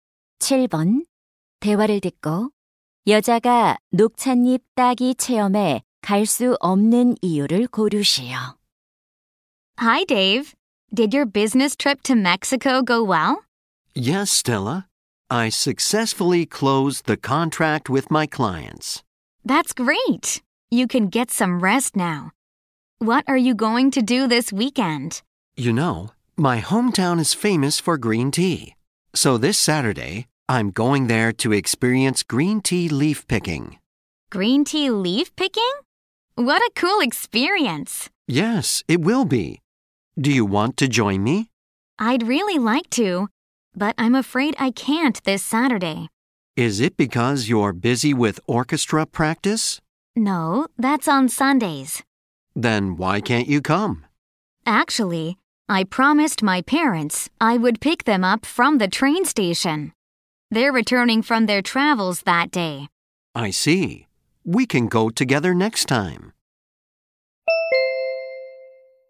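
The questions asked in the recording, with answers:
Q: 대화를 듣고 여자가 녹차잎 따기 체험에 갈 수 없는 이유를 고르시오.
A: 기차역에서 부모님을 모셔 와야 해서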